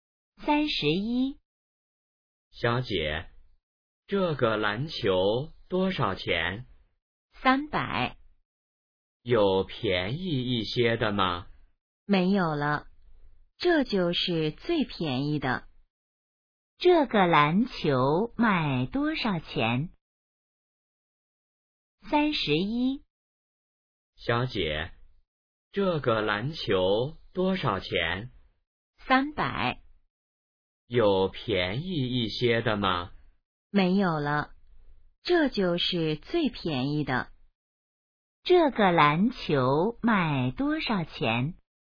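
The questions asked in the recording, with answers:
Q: 这个篮球卖多少钱?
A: 300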